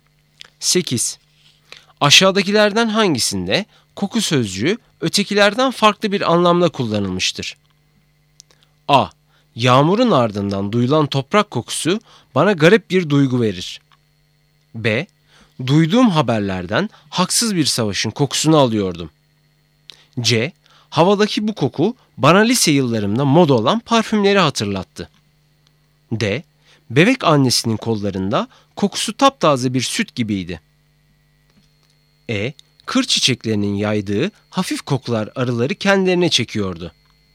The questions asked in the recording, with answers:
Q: Aşağıdakilerden hangisinde koku sözcüğü ötekilerden farklı bir anlamda kullanılmıştır?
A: Doğru cevap B. Duyduğum haberlerden haksız bir savaşın kokusunu alıyordum.